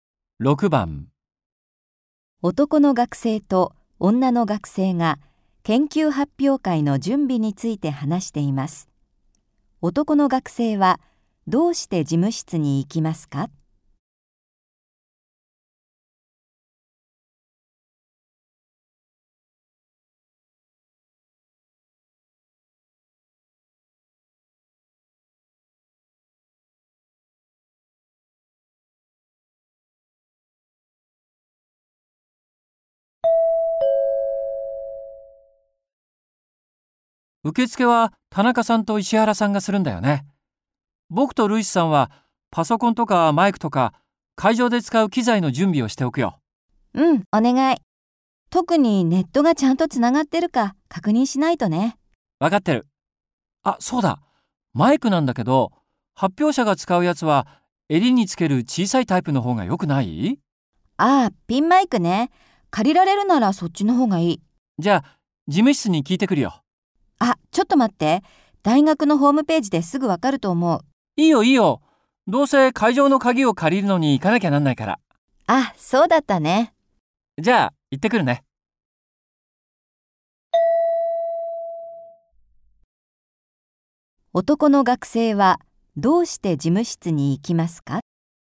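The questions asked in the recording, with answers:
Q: 男の学生はどうして事務室に行きますか?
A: 会場の鍵を借りるため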